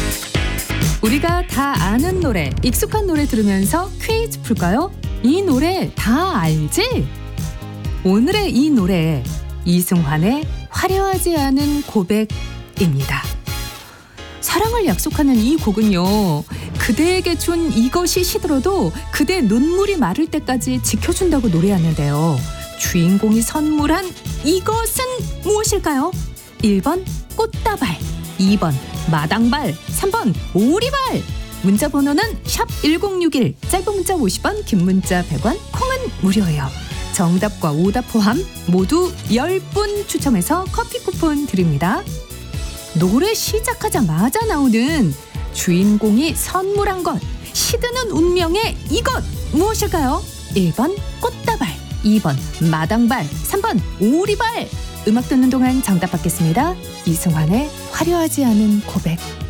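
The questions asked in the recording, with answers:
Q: 주인공이 선물한 이것은 무엇일까요? 1번 꽃다발, 2번 마당발, 3번 오리발.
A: 1: 꽃다발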